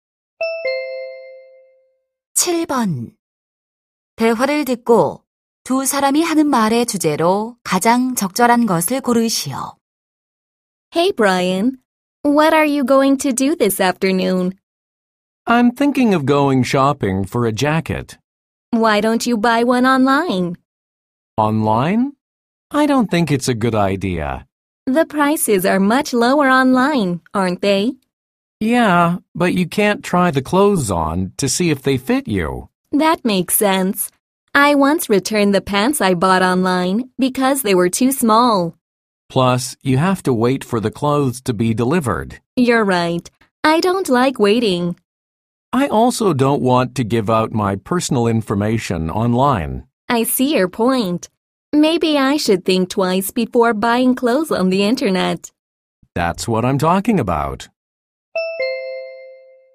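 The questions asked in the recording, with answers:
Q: 대화를 듣고 두 사람이 하는 말의 주제로 가장 적절한 것을 고르시오.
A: 온라인 의류 구매의 단점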